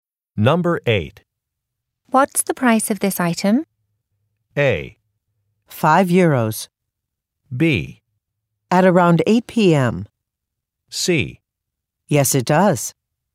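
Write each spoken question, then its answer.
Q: What's the price of this item?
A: A: 5 euros.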